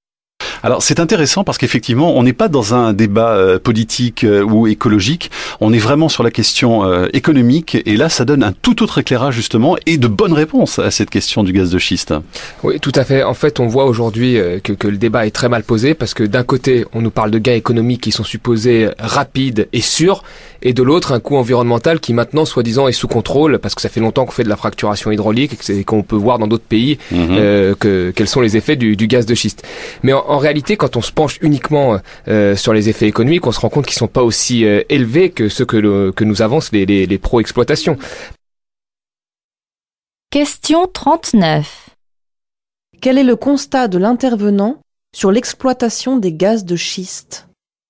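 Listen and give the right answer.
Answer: Ses effets économiques ne sont pas aussi élevés que ce qu'affirment les partisans de l'exploitation.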